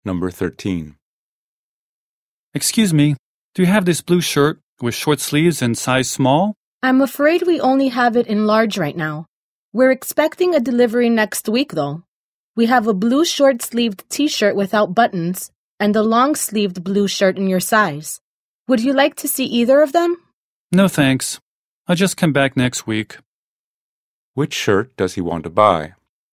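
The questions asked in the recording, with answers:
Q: Which shirt does he want to buy?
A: A blue shirt with short sleeves in size small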